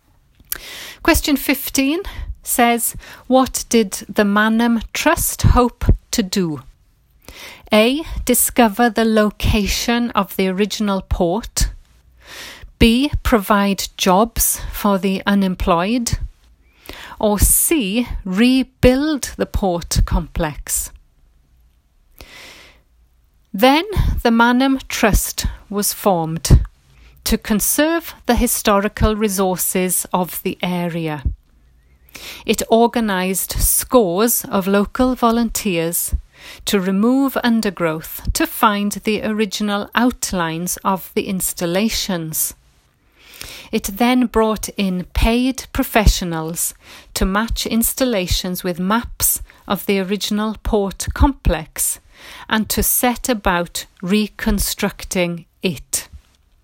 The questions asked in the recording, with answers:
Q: what did the Mannheim Trust hope to do?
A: But then option C says to rebuild the port complex, which means to set about reconstructing it.